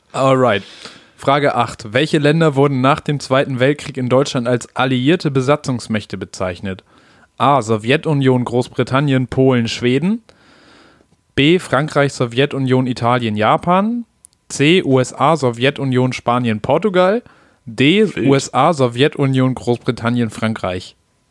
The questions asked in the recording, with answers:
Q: Welche Länder wurden nach dem Zweiten Weltkrieg in Deutschland als alliierte Besatzungsmächte bezeichnet?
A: D. D, ne?